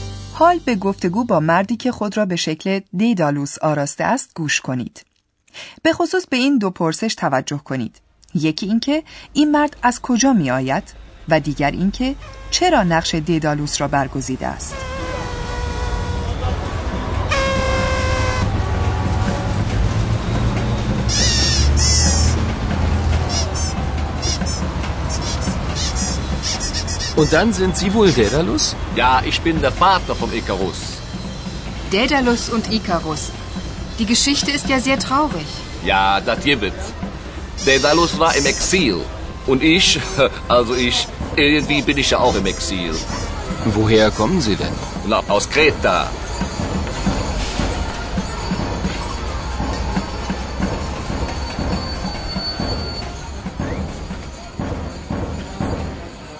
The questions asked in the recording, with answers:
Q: یکی اینکه این مرد از کجا می آید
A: این مرد دست کم به ادعای خودش از این جزیره می آید

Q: دیگر اینکه چرا نقش دیدالوس را برگزیده است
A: و حکایت مردی که لباس ددالوس را بر کرده نیز بر همین منوال است.